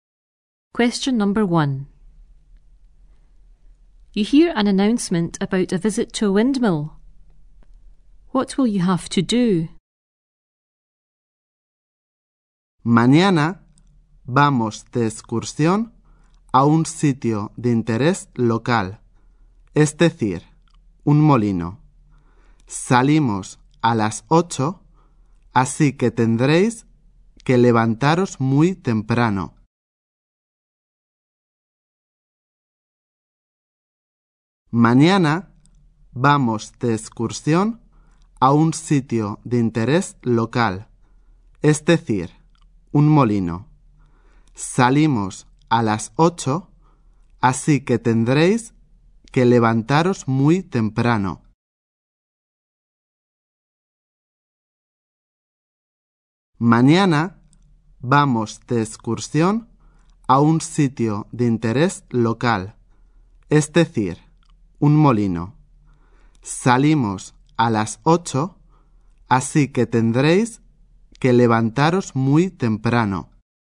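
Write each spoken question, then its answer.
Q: What will you have to do?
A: Get up very early (leaving at 8)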